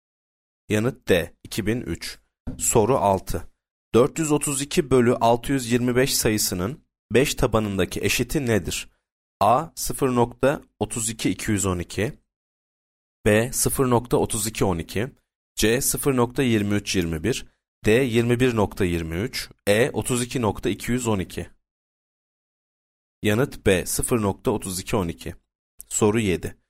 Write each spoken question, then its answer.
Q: 432 bölü 625 sayısının 5 tabanındaki eşiti nedir?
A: Yanıt B 0.3212